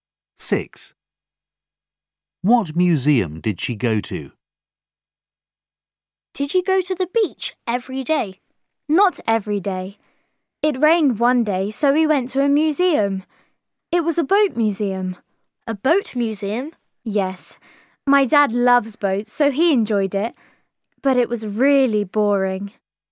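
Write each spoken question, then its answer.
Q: What museum did she go to?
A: A boat museum.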